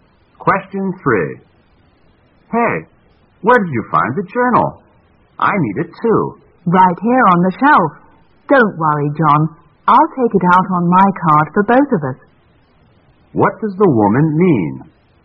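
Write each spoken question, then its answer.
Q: What does the woman mean?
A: She will check out the journal on her card so they can both use it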